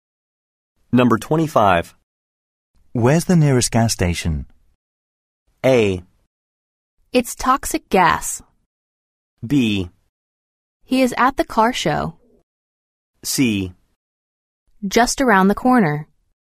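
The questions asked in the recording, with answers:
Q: Where's the nearest gas station?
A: C: Just around the corner.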